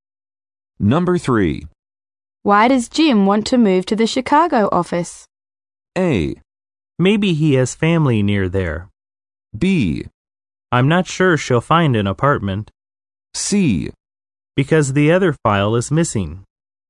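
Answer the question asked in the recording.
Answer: A: Maybe he has family near there.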